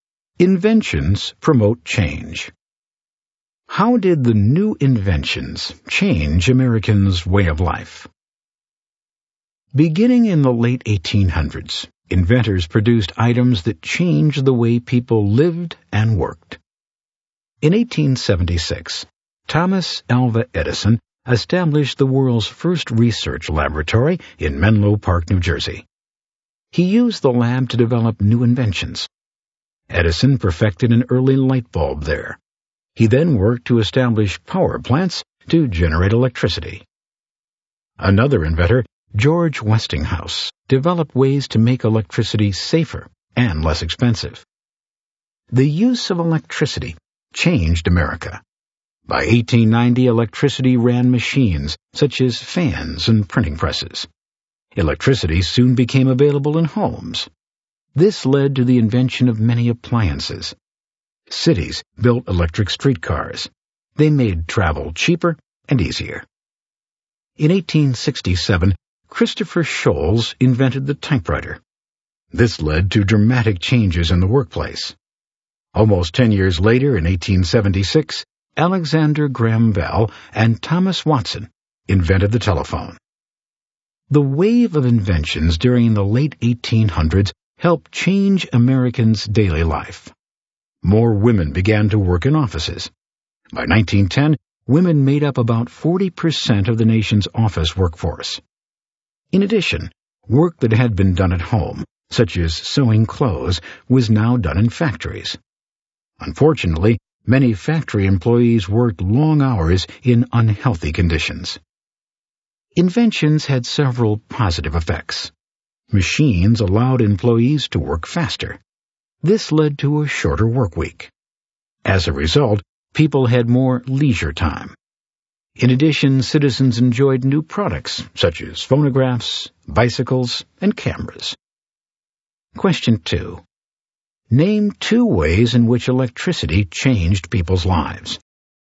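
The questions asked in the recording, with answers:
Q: Name two ways in which electricity changed people's lives.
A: Any two: it ran machines such as fans and printing presses, it led to home appliances, it powered electric streetcars that made travel cheaper and easier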